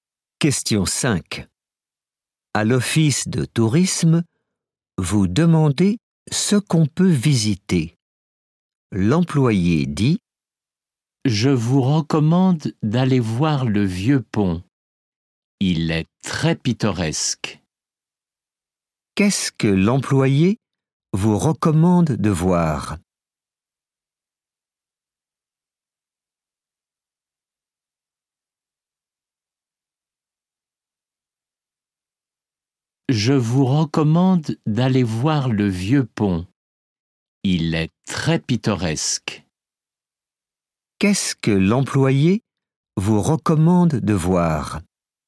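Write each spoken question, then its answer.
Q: Qu'est-ce que l'employé vous recommande de voir?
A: le vieux pont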